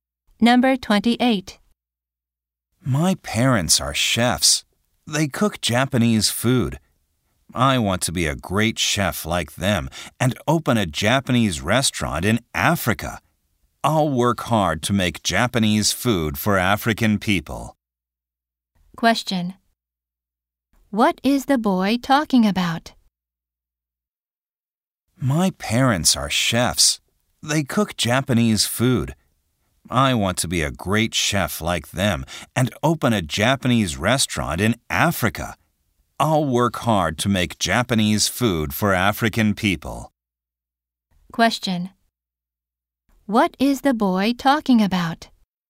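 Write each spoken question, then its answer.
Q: What is the boy talking about?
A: His dream of becoming a chef and opening a Japanese restaurant in Africa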